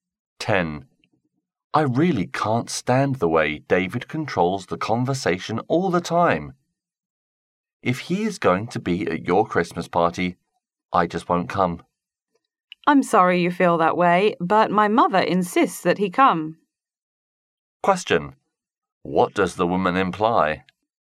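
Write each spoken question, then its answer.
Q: What does the woman imply?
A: She can't stop David from coming to the party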